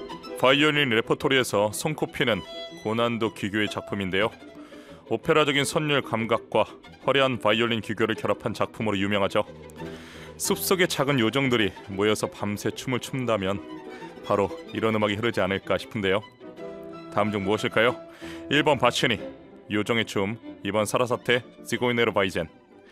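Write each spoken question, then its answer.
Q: 다음 중 무엇일까요? 1번 바치니, 요정의 춤, 2번 사라사테, 시고이네르 바이젠.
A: 1: 바치니, 요정의 춤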